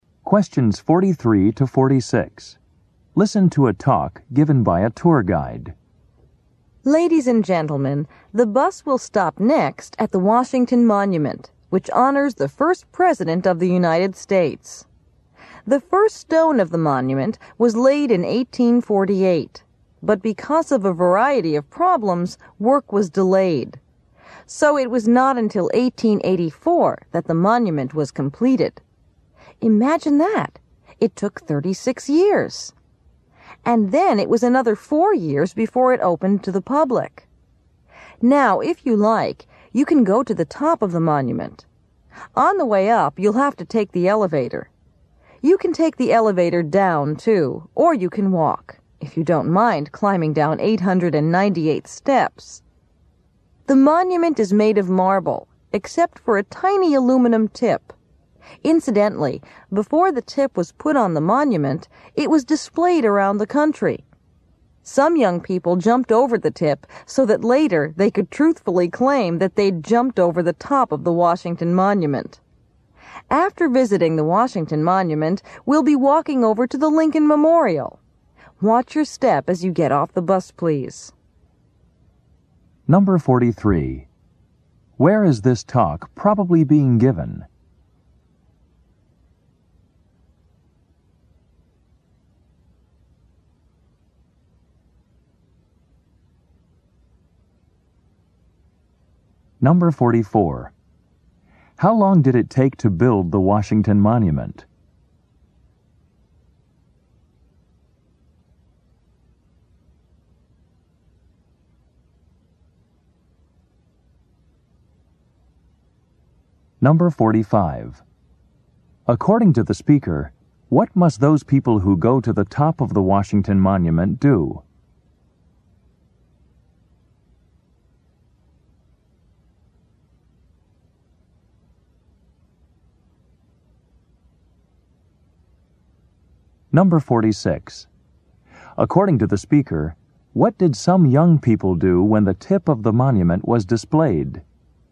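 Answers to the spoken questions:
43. On a tour bus
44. 36 years
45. Take the elevator up
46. They jumped over it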